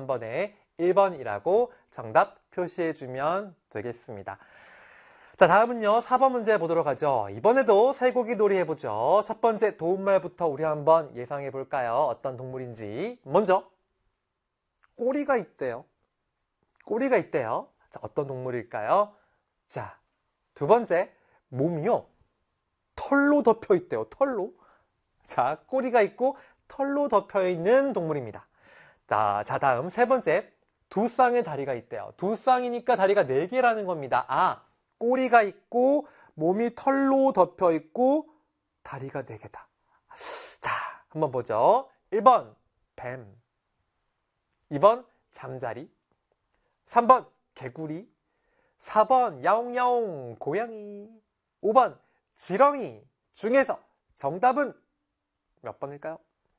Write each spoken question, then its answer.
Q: 5번 지렁이 중에서 정답은 몇 번일까요?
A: 바로 야옹야옹 고양이가 꼬리도 있고요, 털로 덮여 있고요, 다리도 두 쌍, 네개 있잖아요.